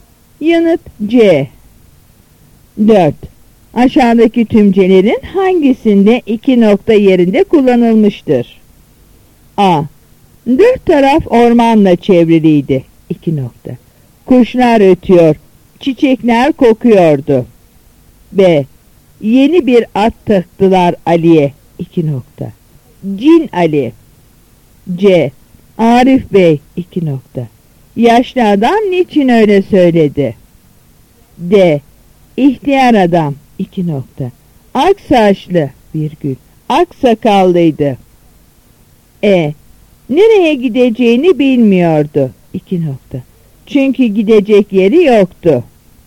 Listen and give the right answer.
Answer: Yanıt B.